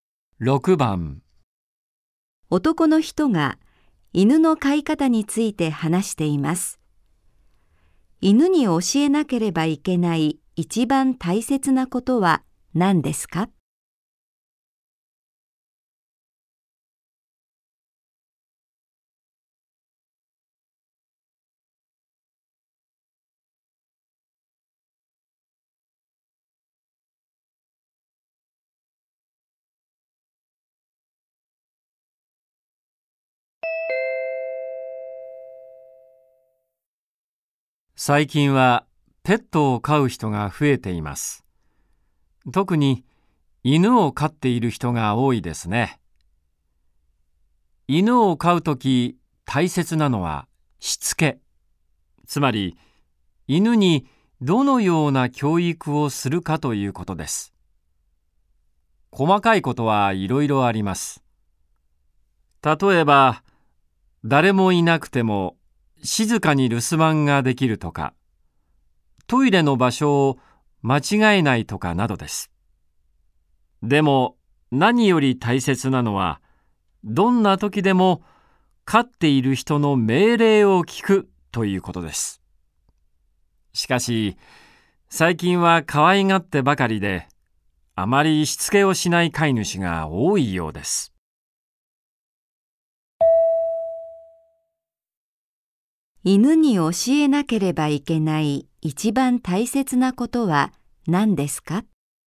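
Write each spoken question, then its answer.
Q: 犬に教えなければいけない一番大切なことは何ですか?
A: どんな時でも飼い主の命令を聞くこと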